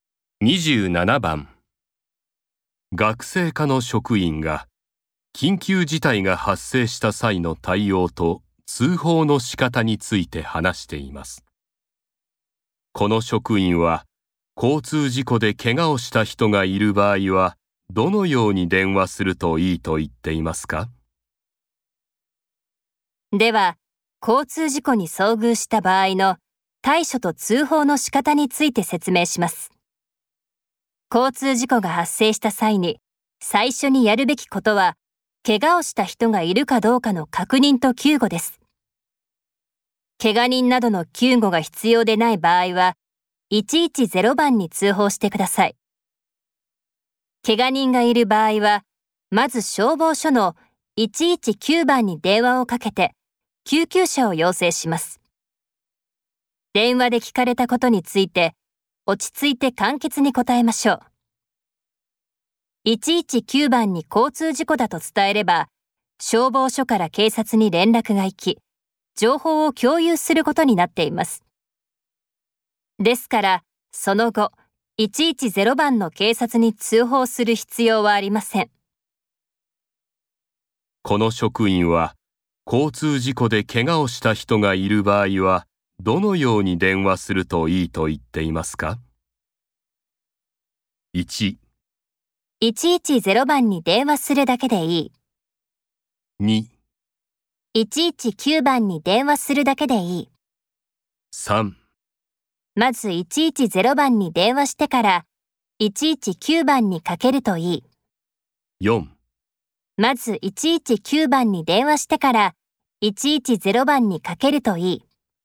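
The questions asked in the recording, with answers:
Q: この職員は、交通事故で怪我をした人がいる場合は、どのように電話するといいと言っていますか?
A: 2: 119番に電話するだけでいい。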